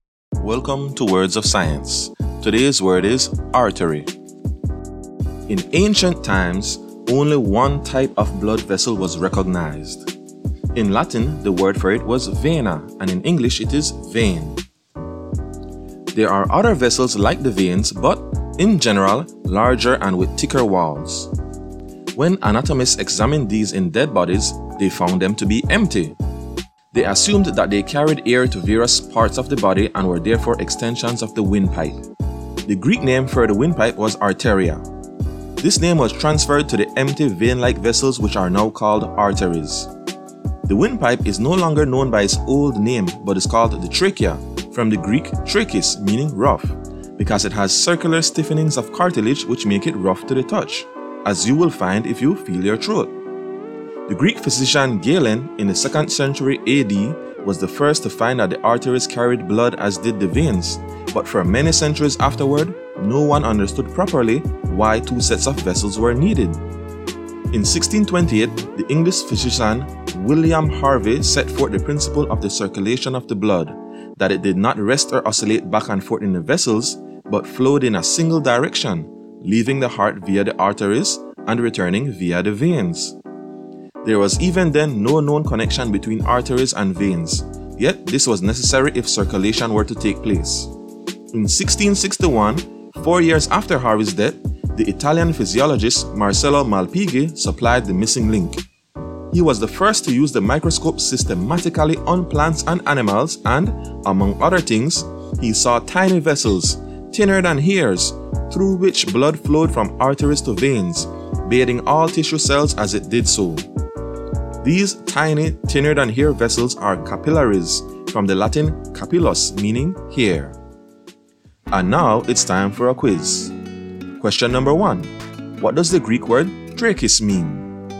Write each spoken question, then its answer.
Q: What does the Greek word trachis mean?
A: And the answer to the first question is rough.